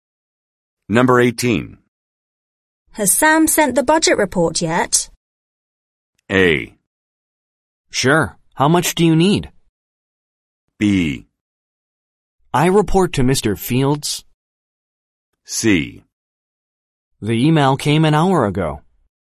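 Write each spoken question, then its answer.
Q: Has Sam sent the budget report yet?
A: C: The email came an hour ago.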